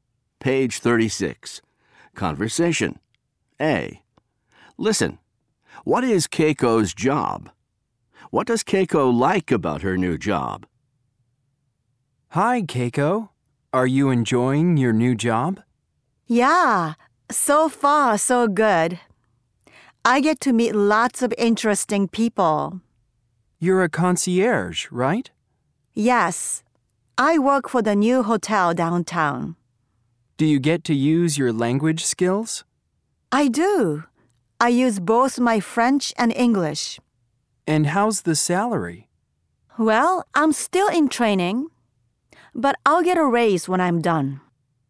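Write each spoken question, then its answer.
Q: What is Keiko's job?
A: She is a concierge at the new hotel downtown.

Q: What does Keiko like about her new job?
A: She gets to meet lots of interesting people.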